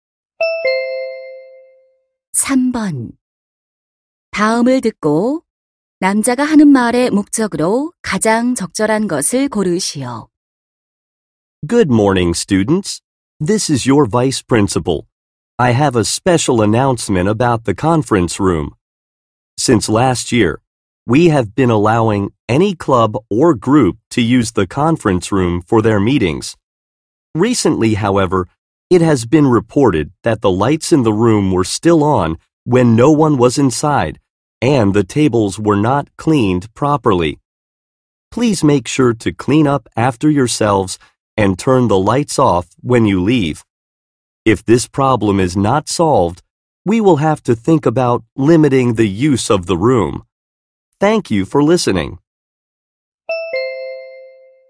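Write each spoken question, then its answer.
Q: 다음을 듣고 남자가 하는 말의 목적으로 가장 적절한 것을 고르시오.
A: 회의실 사용 후 청소하고 불을 끄도록 당부하려고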